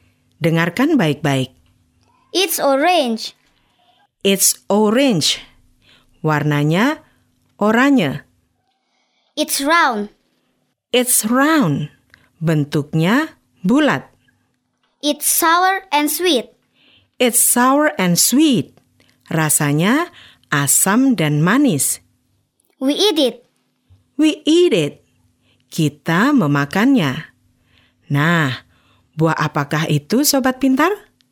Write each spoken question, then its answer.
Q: Nah, buah apakah itu, Sobat Pintar?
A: Ya, it's an orange. Buah jeruk.